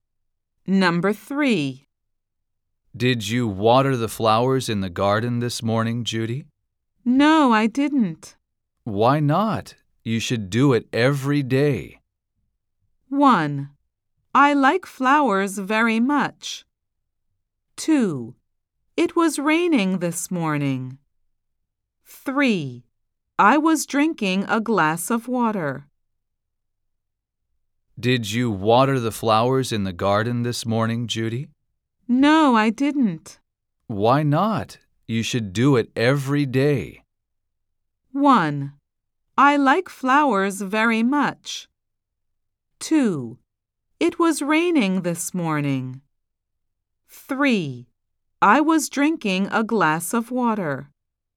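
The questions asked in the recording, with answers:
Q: Why not? You should do it every day.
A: 2: It was raining this morning.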